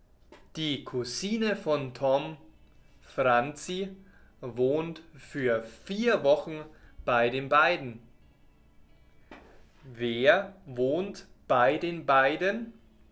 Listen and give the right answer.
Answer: Franzi. Sie wohnt bei den beiden.